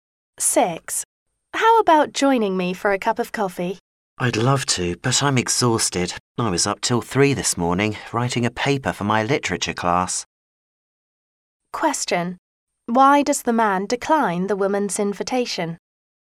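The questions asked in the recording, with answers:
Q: Why does the man decline the woman's invitation?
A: He is exhausted from staying up till 3 writing a paper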